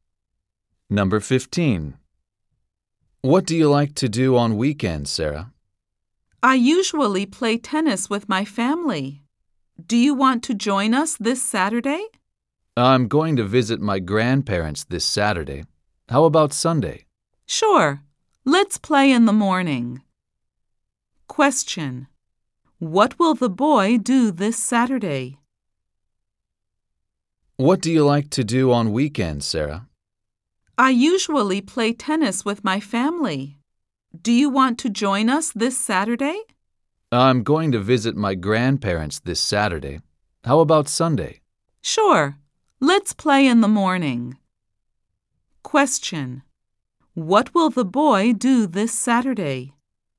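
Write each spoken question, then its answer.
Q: What will the boy do this Saturday?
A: Visit his grandparents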